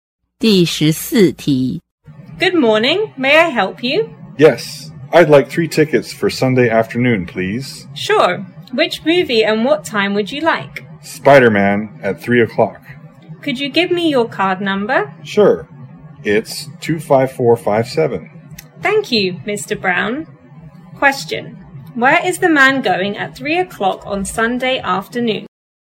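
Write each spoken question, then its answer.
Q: Where is the man going at 3 o'clock on Sunday afternoon?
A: To the movie theater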